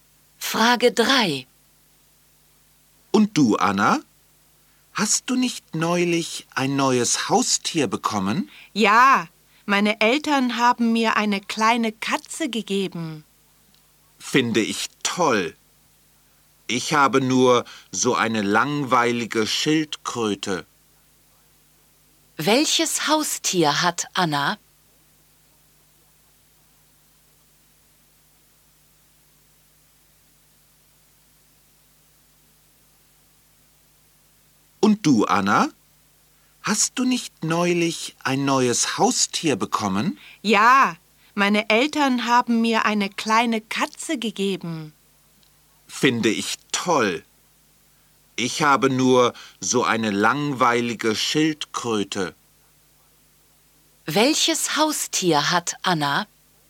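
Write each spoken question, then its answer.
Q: Welches Haustier hat Anna?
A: Eine kleine Katze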